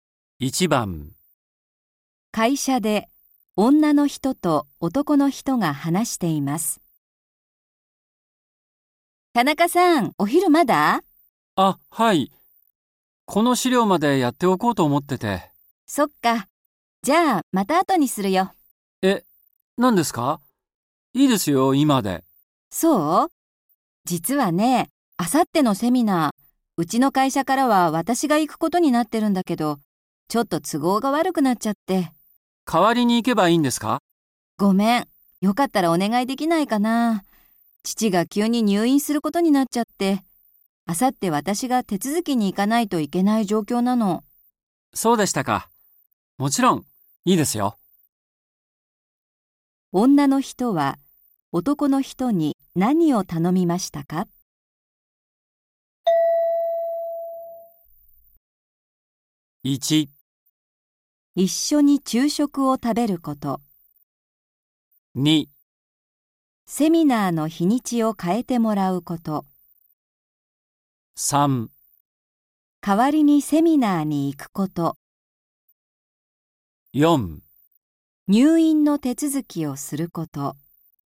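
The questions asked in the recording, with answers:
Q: 女の人は男の人に何を頼みましたか?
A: 3: 代わりにセミナーに行くこと。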